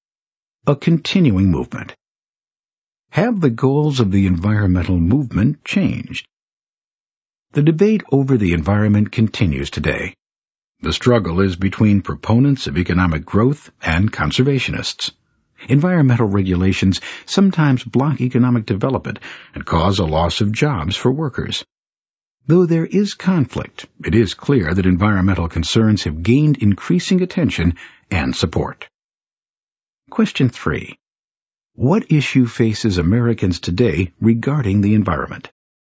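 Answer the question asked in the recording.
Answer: The conflict between economic growth and conservation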